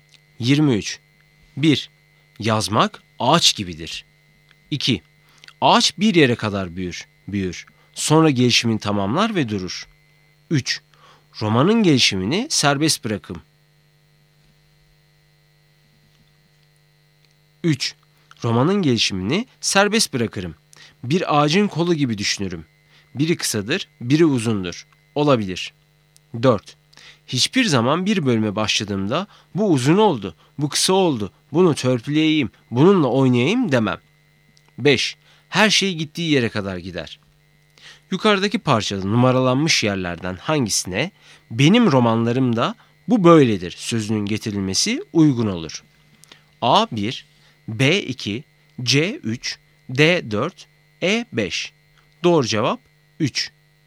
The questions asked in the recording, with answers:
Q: Yukarıdaki parçada numaralanmış yerlerden hangisine benim romanlarımda bu böyledir sözünün getirilmesi uygun olur.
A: Doğru cevap 3.